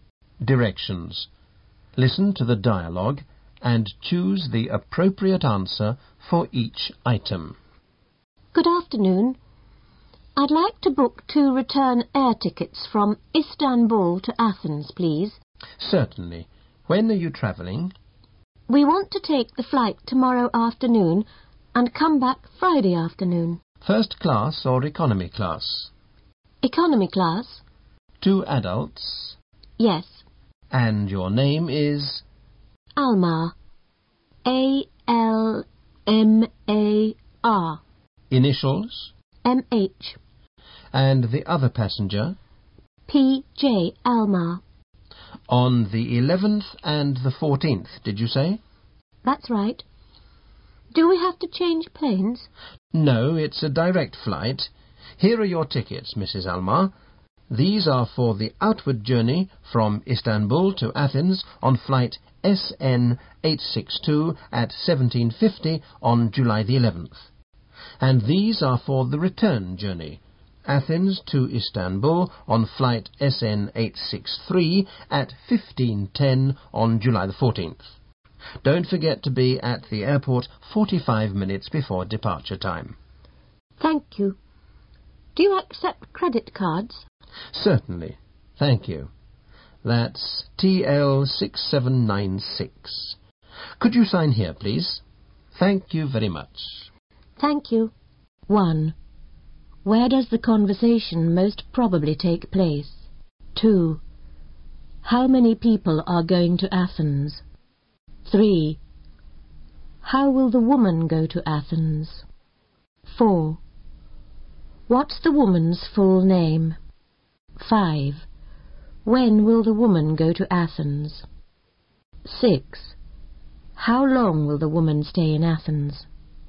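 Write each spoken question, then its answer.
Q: Where does the conversation most probably take place?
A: At a travel agency / airline ticket office

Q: How many people are going to Athens?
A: Two

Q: How will the woman go to Athens?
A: By plane (economy class, direct flight)

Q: When will the woman go to Athens?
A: Tomorrow afternoon, July 11th, at 17:50

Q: How long will the woman stay in Athens?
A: Three days (July 11th to 14th)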